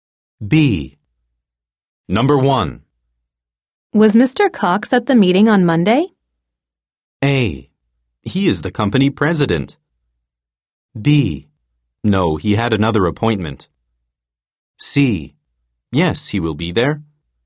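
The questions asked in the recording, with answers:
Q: Was Mr. Cox at the meeting on Monday?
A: B: No, he had another appointment.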